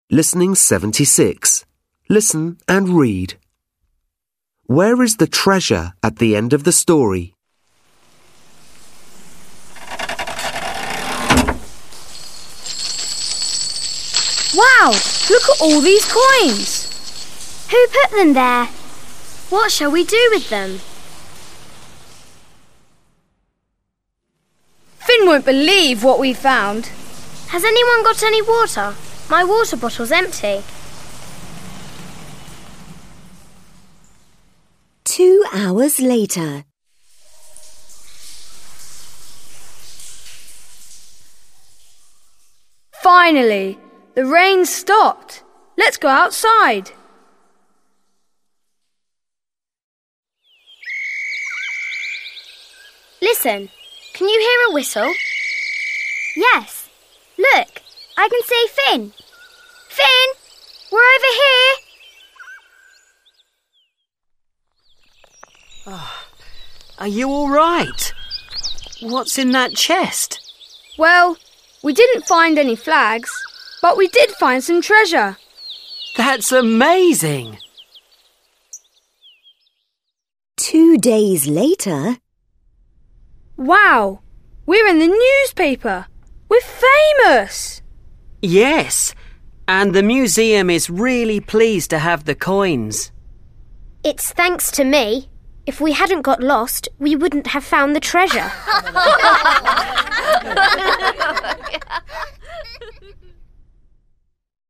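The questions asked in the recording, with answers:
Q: Where is the treasure at the end of the story?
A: In the museum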